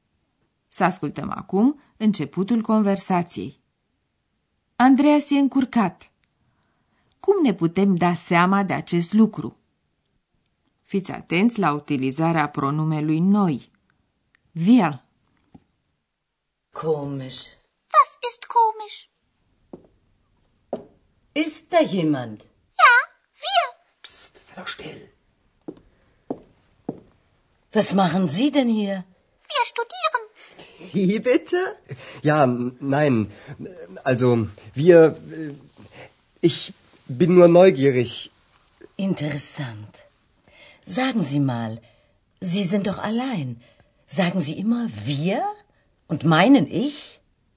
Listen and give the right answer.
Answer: Auzind vocea lui Andreas și felul cum se bâlbâie, v-ați dat seama că e încurcat.